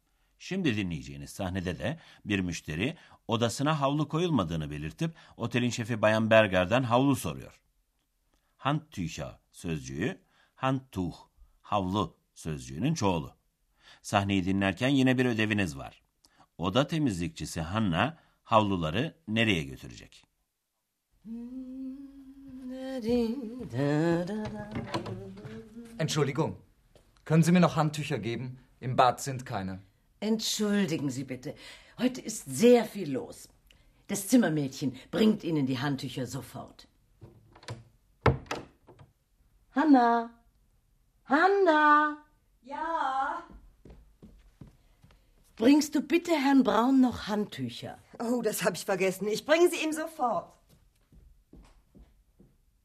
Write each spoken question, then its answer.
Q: Oda temizlikçisi Hanna havluları nereye götürecek?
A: Evet, Hanna'nın eksik havluları Bay Brown'a götürmesi istendi.